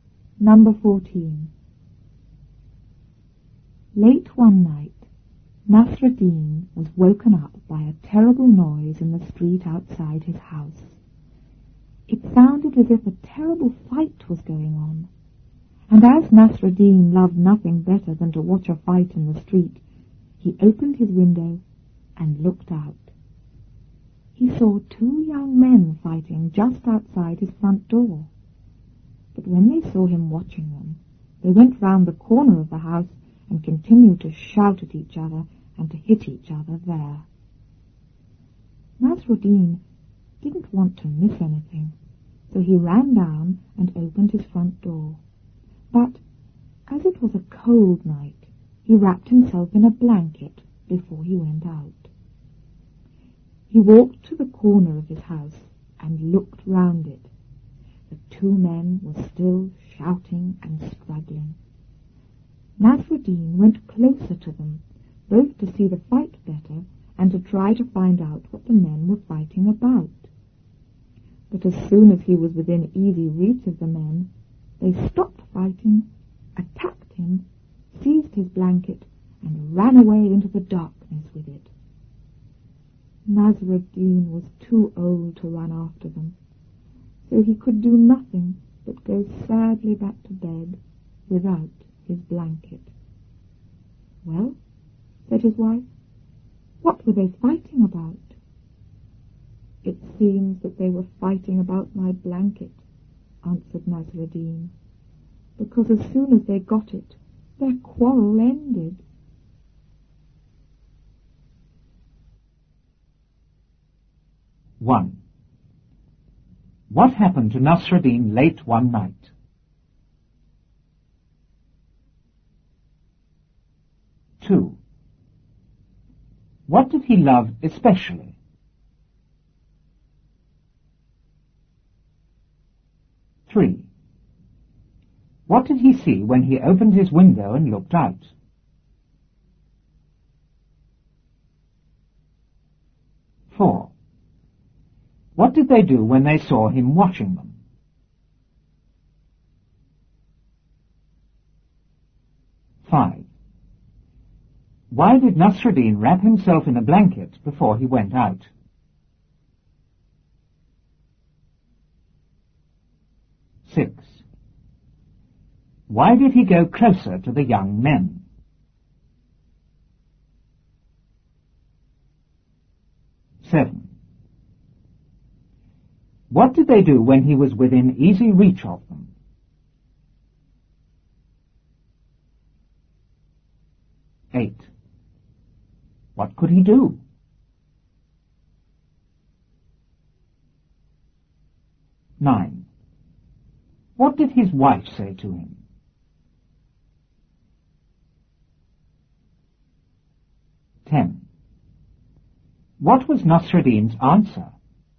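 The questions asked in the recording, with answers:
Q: What happened to Nasruddin late one night?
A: He was woken up by a terrible noise in the street outside his house.

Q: What did he love especially?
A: Watching a fight in the street.

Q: What did he see when he opened his window and looked out?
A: Two young men fighting just outside his front door.

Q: What did they do when they saw him watching them?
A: They went round the corner of the house and kept shouting at and hitting each other.

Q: Why did Nasruddin wrap himself in a blanket before he went out?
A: Because it was a cold night.

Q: Why did he go closer to the young men?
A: To see the fight better and find out what they were fighting about.

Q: What did they do when he was within easy reach of them?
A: They stopped fighting, attacked him, took his blanket and ran away.

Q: What could he do?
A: Nothing but go sadly back to bed without his blanket.

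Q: What did his wife say to him?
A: "Well, what were they fighting about?"

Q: What was Nasruddin's answer?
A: They were fighting about his blanket, because their quarrel ended as soon as they got it.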